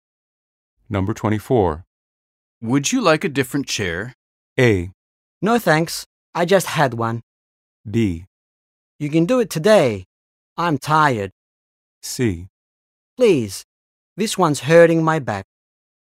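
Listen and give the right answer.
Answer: C: Please. This one's hurting my back.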